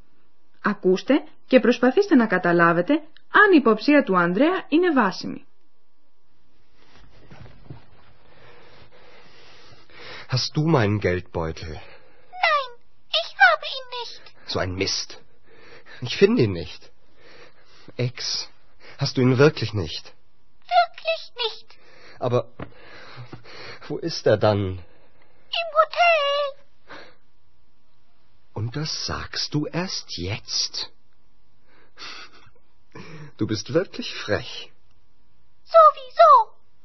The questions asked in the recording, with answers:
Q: Ακούστε και προσπαθήστε να καταλάβετε αν η υποψία του Ανδρέα είναι βάσιμη.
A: Είναι αλήθεια πως η Έξ δεν έχει το πορτοφόλι.